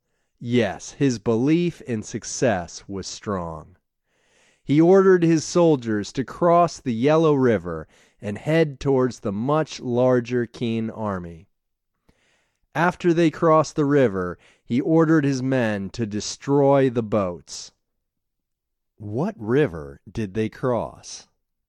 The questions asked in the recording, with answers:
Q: What river did they cross?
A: They crossed the Yellow River.